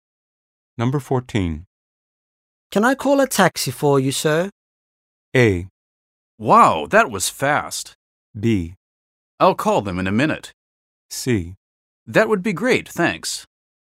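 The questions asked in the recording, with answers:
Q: Can I call a taxi for you, sir?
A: C: That would be great, thanks.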